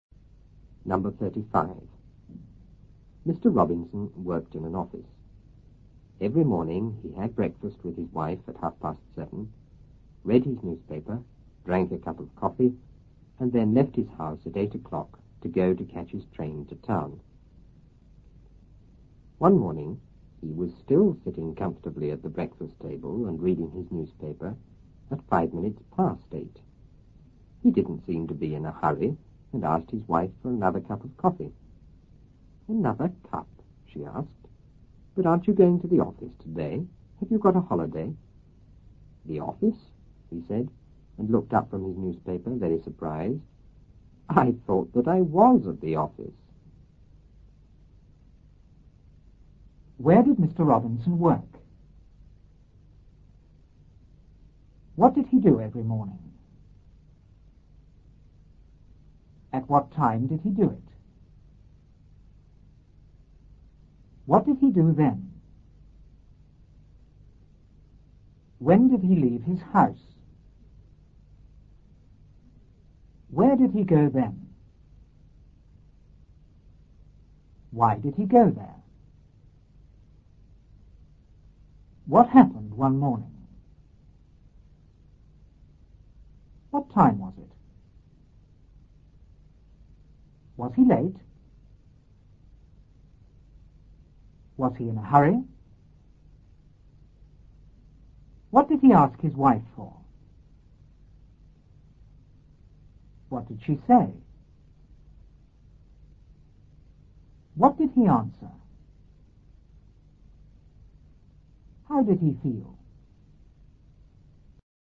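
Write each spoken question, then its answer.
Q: Where did Mr. Robinson work?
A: In an office

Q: What did he do every morning?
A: He had breakfast with his wife

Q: At what time did he do it?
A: At 7:30

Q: What did he do then?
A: Read his newspaper and drank a cup of coffee

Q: When did he leave his house?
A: At 8 o'clock

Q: Where did he go then?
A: To catch his train to town

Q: What happened one morning?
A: He was still sitting at the breakfast table reading his newspaper

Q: What time was it?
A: 8:05

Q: Was he in a hurry?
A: No

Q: What did he ask his wife for?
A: Another cup of coffee

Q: What did she say?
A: Another cup? Aren't you going to the office today? Have you got a holiday?

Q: What did he answer?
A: I thought that I was at the office.

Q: How did he feel?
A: Very surprised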